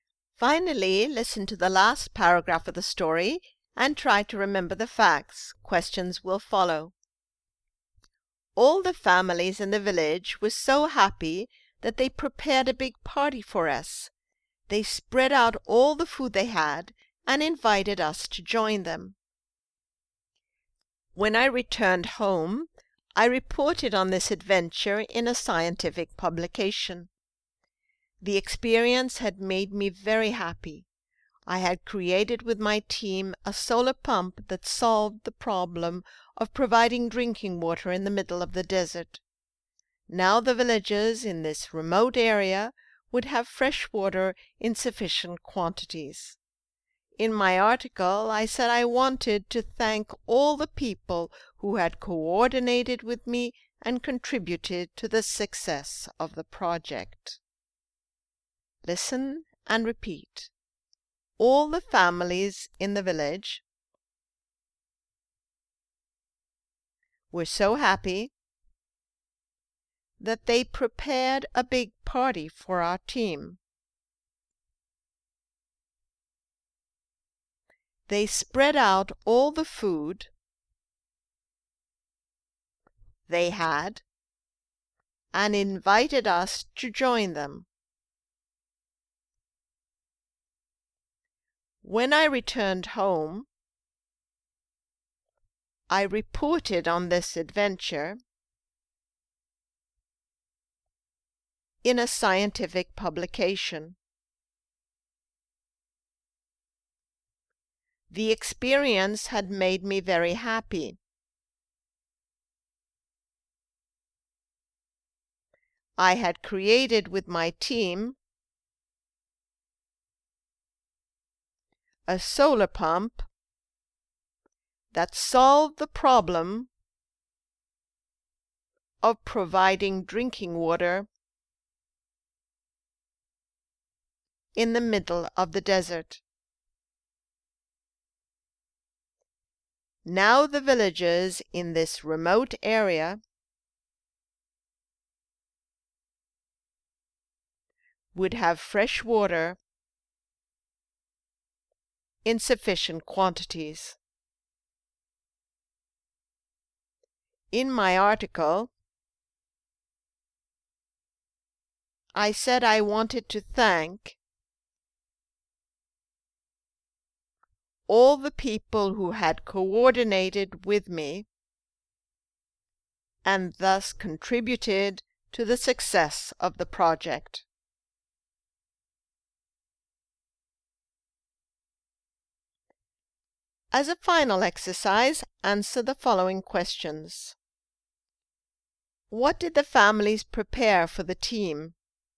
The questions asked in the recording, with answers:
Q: What did the families prepare for the team?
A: They prepared a big party for them.